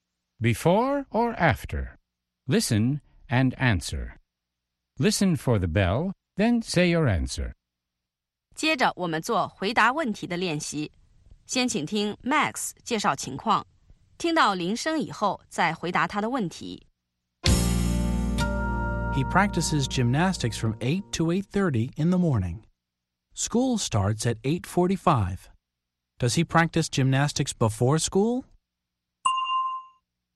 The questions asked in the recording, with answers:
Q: Does he practice gymnastics before school?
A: Yes, he does. He practices gymnastics before school.